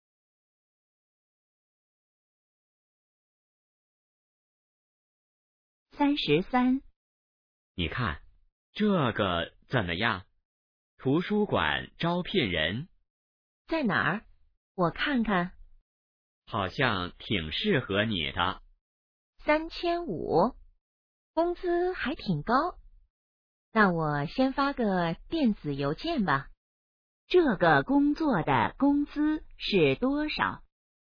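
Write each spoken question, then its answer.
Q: 这个工作的工资是多少?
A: 3500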